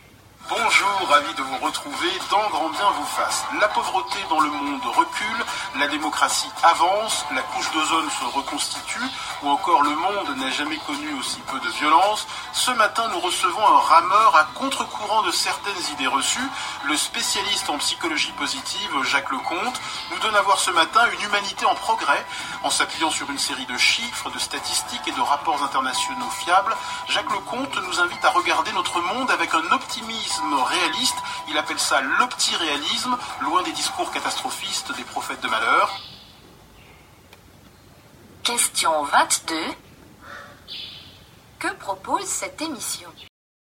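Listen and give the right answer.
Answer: Un regard optimiste sur les progrès de l'humanité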